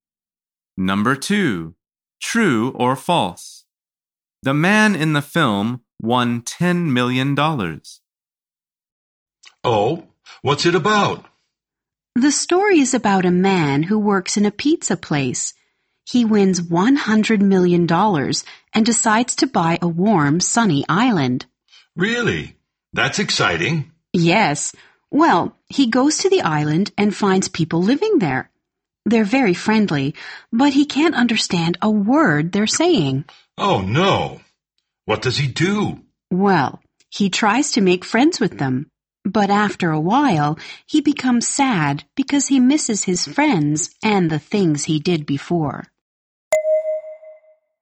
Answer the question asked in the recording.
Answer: The answer is false. He won $100 million.